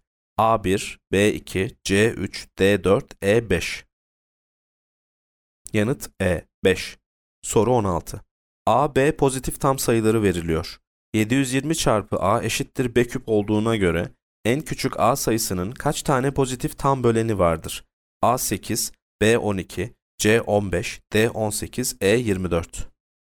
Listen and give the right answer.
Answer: Yanıt D 18.